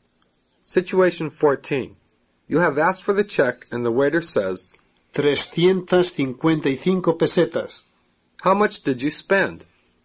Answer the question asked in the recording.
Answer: 355 pesetas.